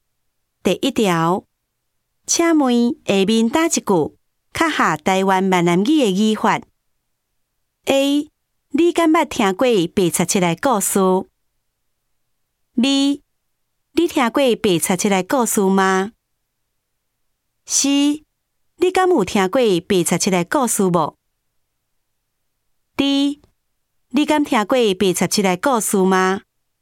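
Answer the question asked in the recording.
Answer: A: 你敢捌听过白贼七来故事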